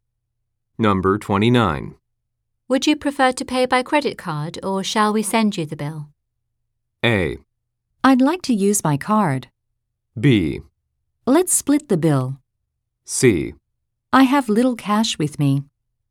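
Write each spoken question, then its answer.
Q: Would you prefer to pay by credit card or shall we send you the bill?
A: A: I'd like to use my card.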